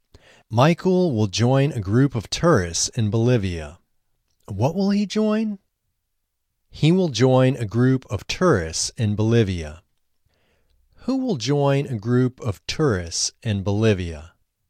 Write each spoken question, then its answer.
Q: Who will join a group of tourists in Bolivia?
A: Michael will join a group of tourists in Bolivia.